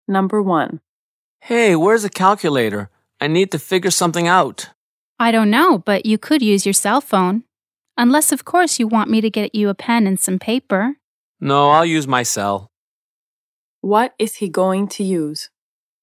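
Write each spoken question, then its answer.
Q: What is he going to use?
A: His cell phone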